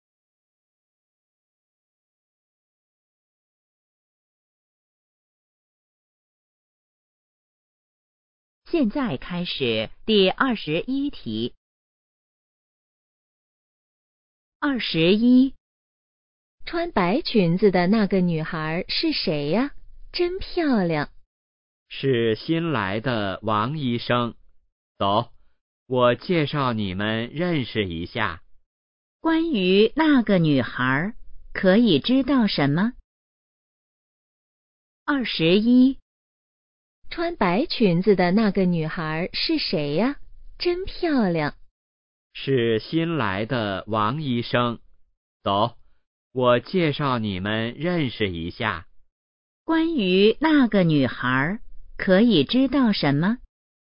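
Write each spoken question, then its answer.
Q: 关于那个女孩可以知道什么?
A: 她是新来的医生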